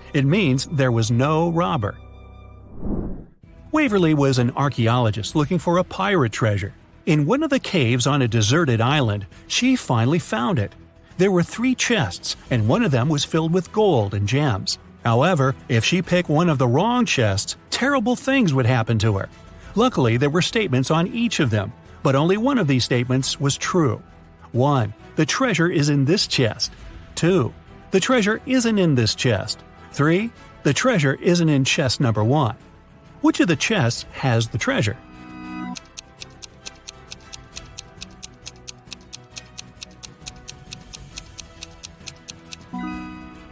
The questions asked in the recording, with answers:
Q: Which of the chests has the treasure?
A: the treasure is in the second chest.